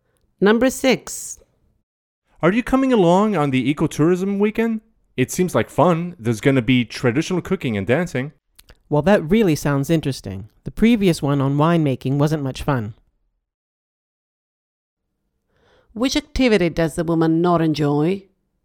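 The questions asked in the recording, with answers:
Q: Which activity does the woman not enjoy?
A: winemaking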